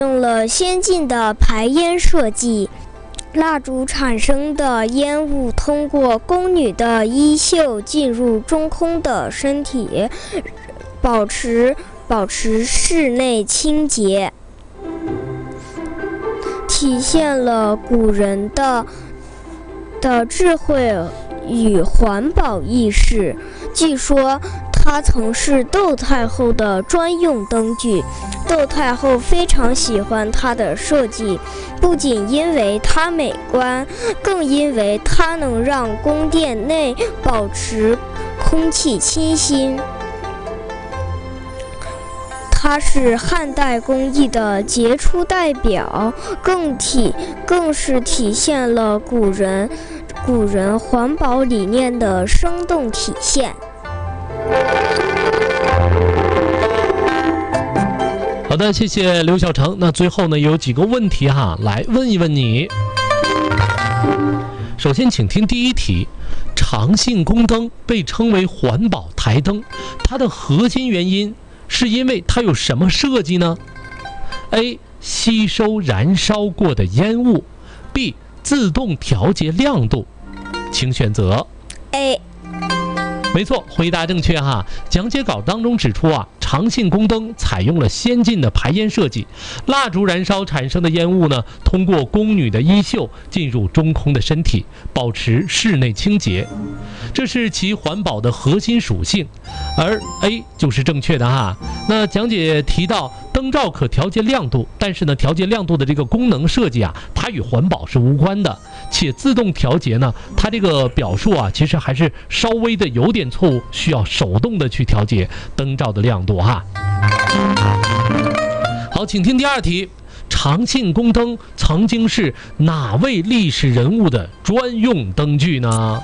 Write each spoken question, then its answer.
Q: 长庆宫灯曾经是哪位历史人物的专用灯具呢?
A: 窦太后。